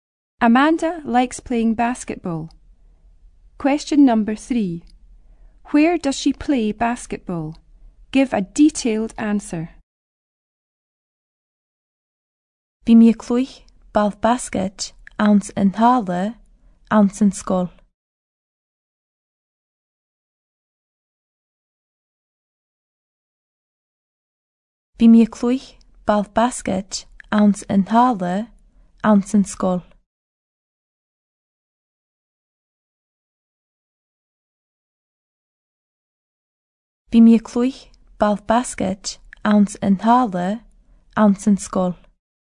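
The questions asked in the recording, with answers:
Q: Where does she play basketball?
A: In the hall in the school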